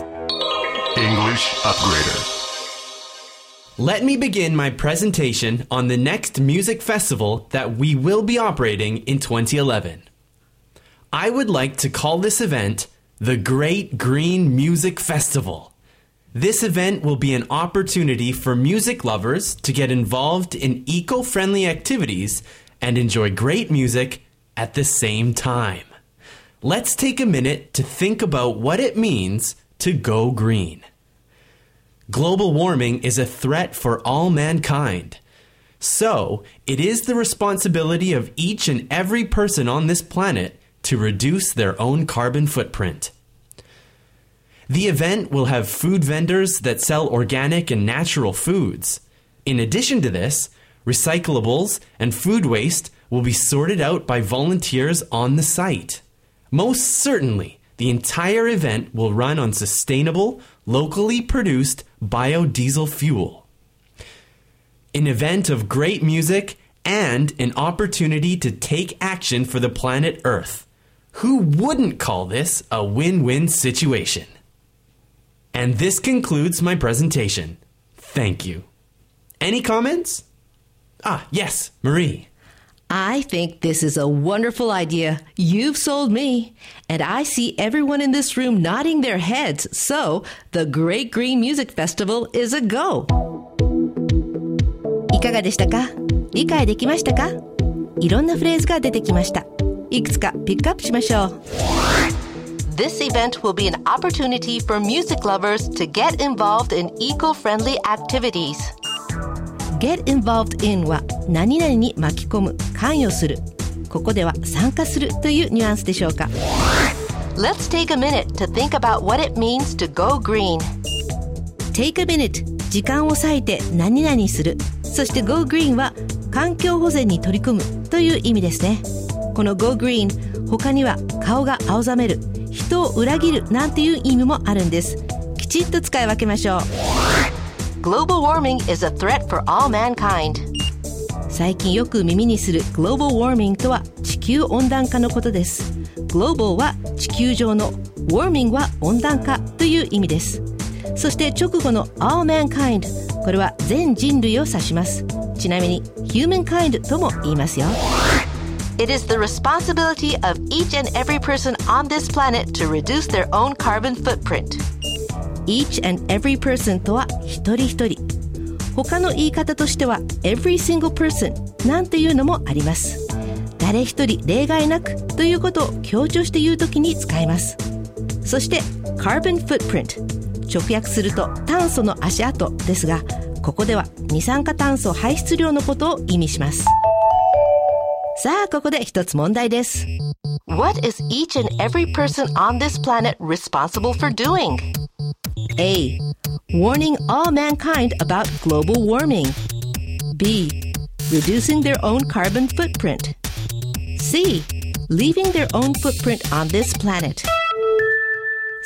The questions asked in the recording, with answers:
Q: What is each and every person on this planet responsible for doing?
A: 正解は B. Reducing their own carbon footprint.